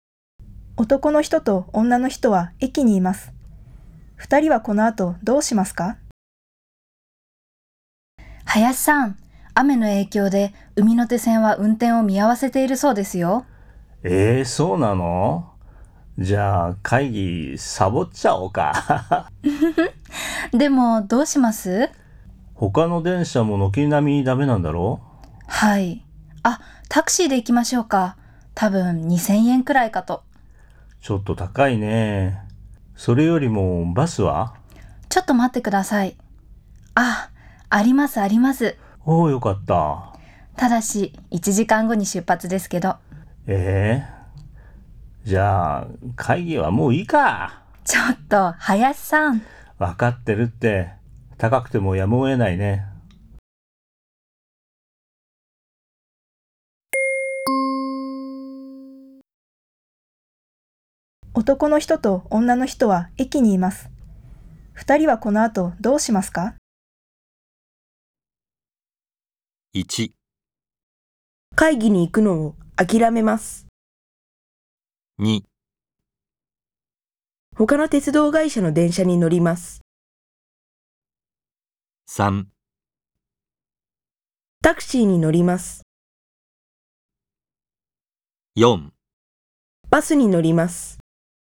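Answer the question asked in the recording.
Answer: 3: タクシーに乗ります。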